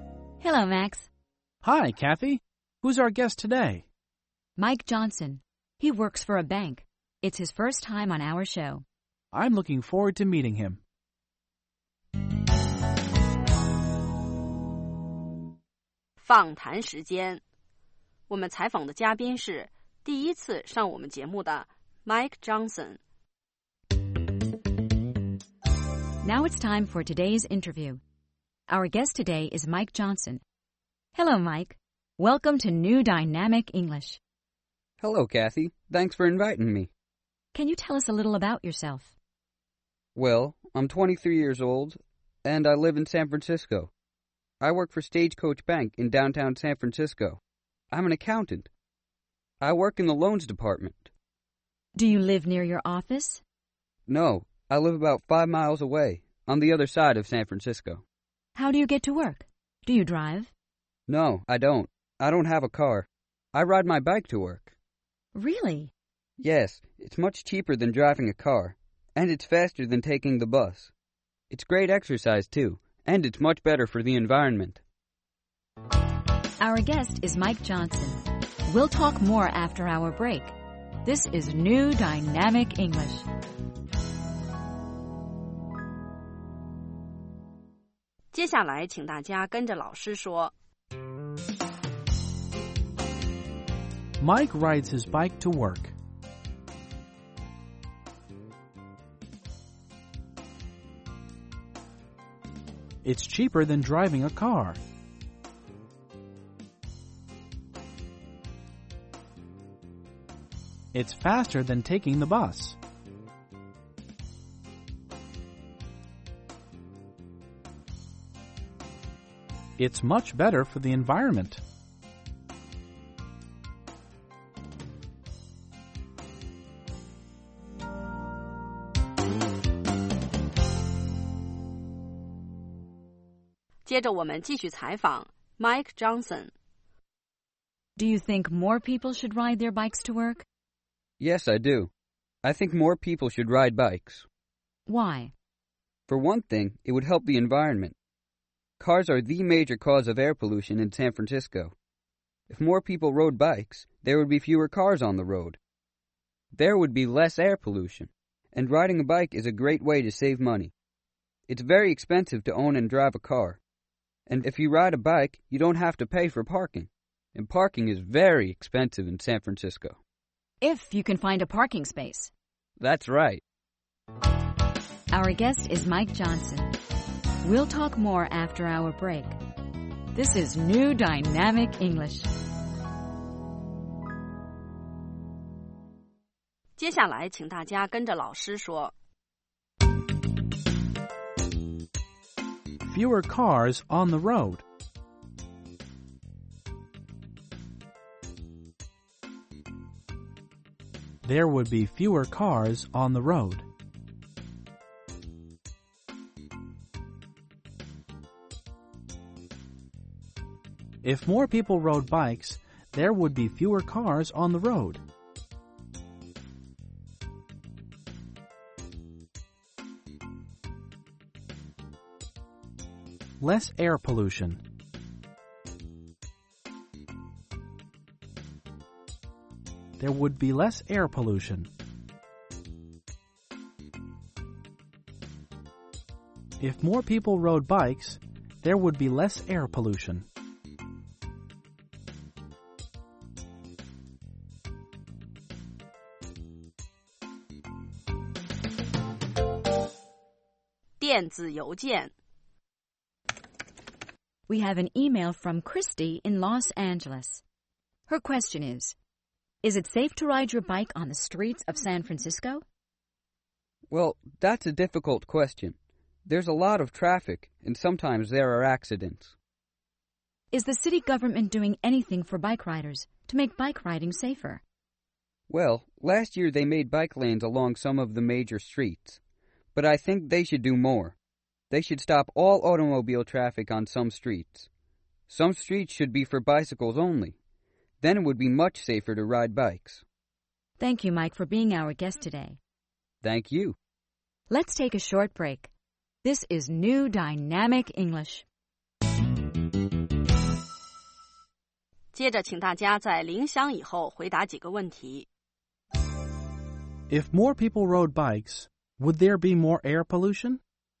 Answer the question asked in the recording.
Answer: No, there wouldn't. There would be less air pollution because there would be fewer cars.